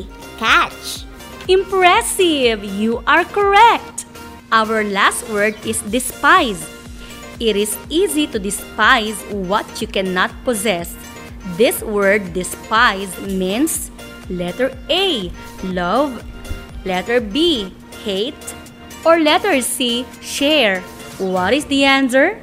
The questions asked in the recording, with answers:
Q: What is the answer?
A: Ma'am, the word despise means letter B, hate.